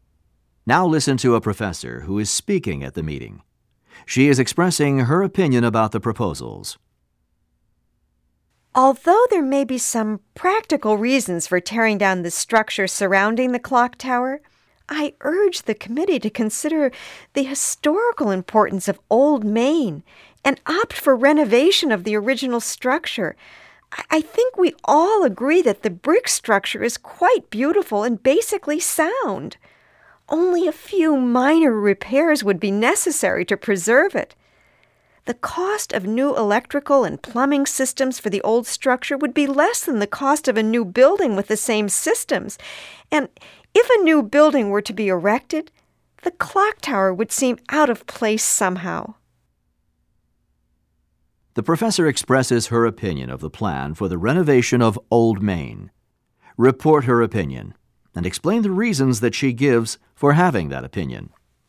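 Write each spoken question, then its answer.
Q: The professor expresses her opinion of the plan for the renovation of Old Main. Report her opinion and explain the reasons that she gives for having that opinion.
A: She favors renovating the original structure rather than tearing it down: it is historically important, beautiful and basically sound, needs only minor repairs, new systems would cost less than a new building, and the clock tower would look out of place with a new building.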